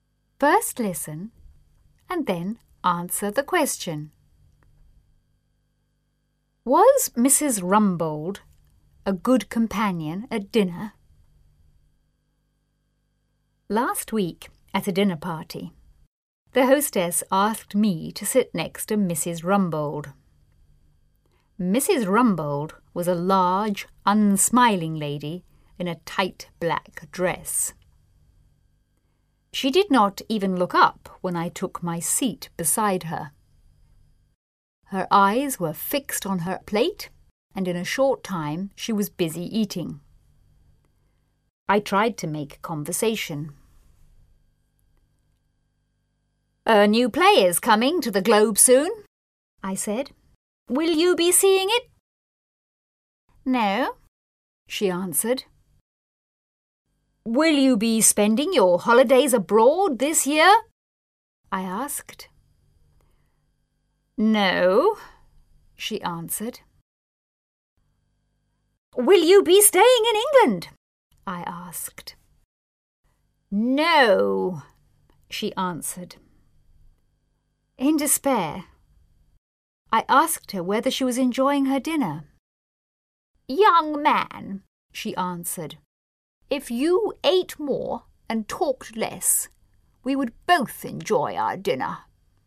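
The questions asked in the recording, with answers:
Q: Was Mrs. Rumbold a good companion at dinner?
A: No, she barely talked and only wanted to eat.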